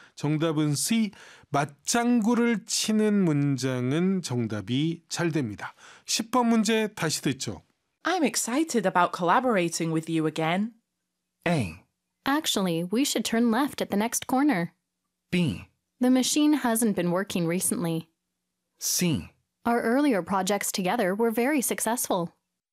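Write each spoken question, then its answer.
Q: I'm excited about collaborating with you again.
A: C: Our earlier projects together were very successful.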